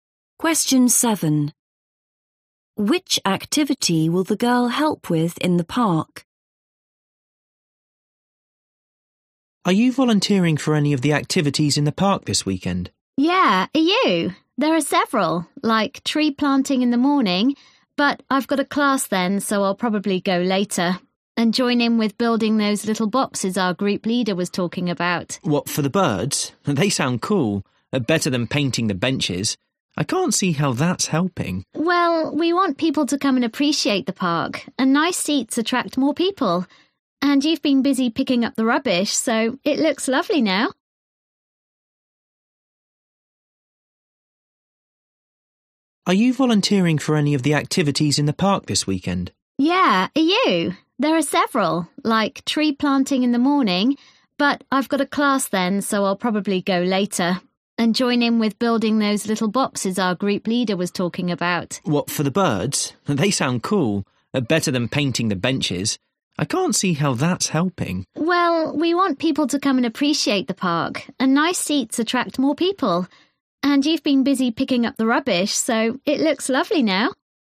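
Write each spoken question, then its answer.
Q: Which activity will the girl help with in the park?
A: building bird boxes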